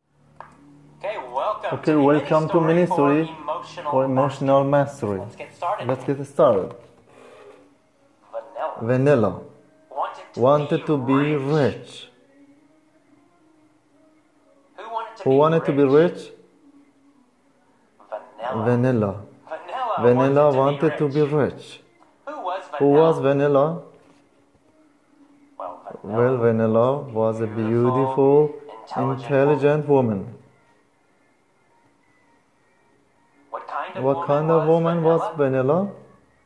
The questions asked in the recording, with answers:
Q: What kind of woman was Vanilla?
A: She was a beautiful, intelligent woman.